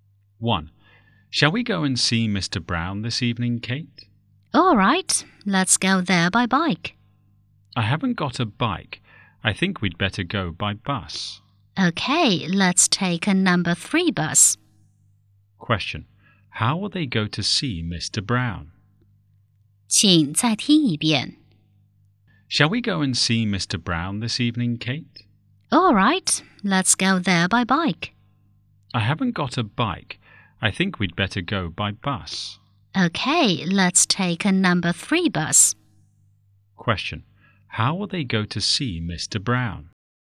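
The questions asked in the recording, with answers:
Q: How will they go to see Mr. Brown?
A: By bus (a number 3 bus)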